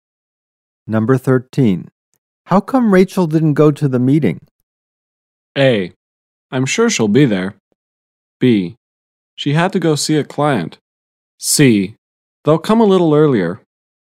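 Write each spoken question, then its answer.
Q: How come Rachel didn't go to the meeting?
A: B: She had to go see a client.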